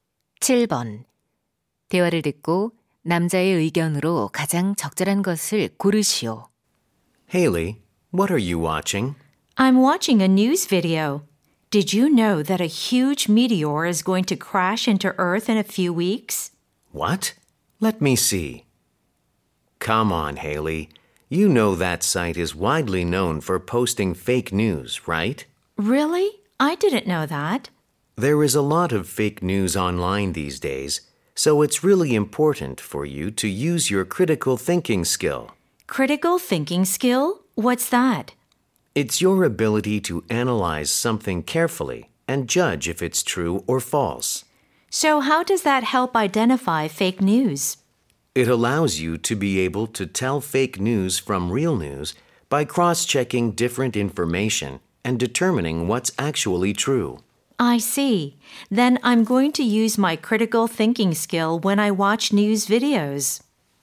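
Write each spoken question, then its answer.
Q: 대화를 듣고 남자의 의견으로 가장 적절한 것을 고르시오.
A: 가짜 뉴스를 판별하려면 비판적 사고력을 사용해야 한다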